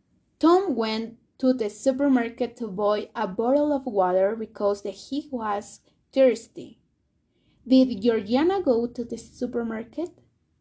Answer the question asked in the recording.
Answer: No, Georgiana didn't go to the supermarket.